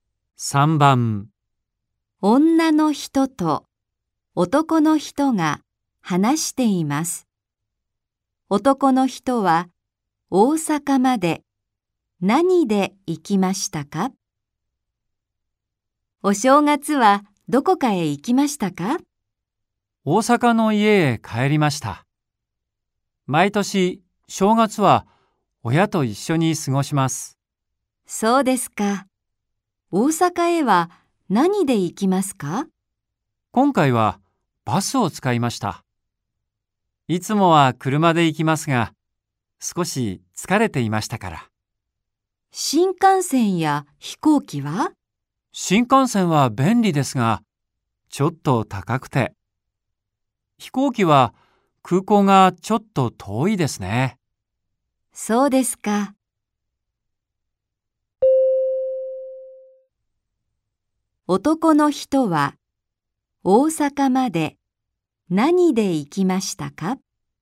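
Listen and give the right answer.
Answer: バス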